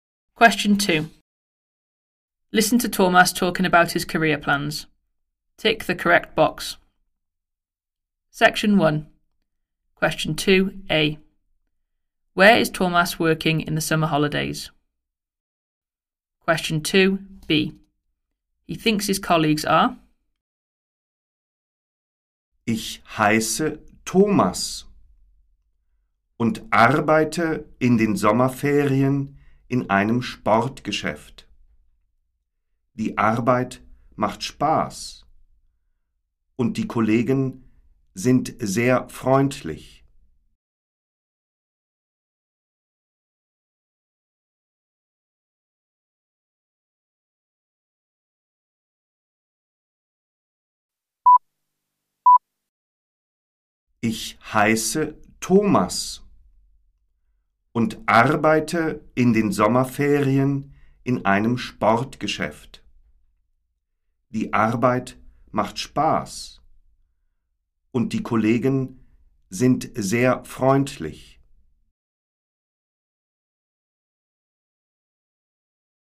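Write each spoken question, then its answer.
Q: Where is Thomas working in the summer holidays?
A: In a sports shop

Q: He thinks his colleagues are.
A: very friendly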